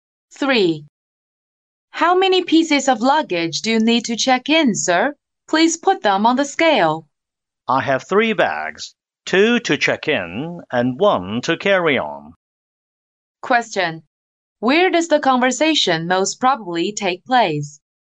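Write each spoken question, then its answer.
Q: Where does the conversation most probably take place?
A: At an airport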